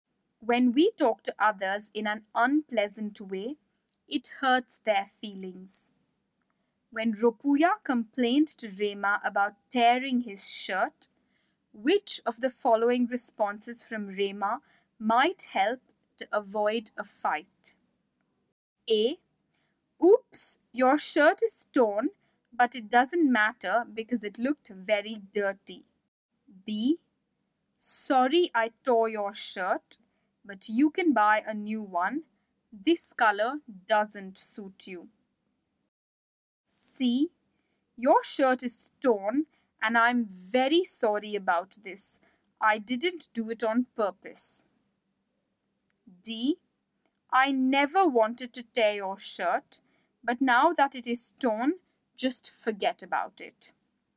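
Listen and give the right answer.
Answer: C: Your shirt is torn and I'm very sorry about this. I didn't do it on purpose.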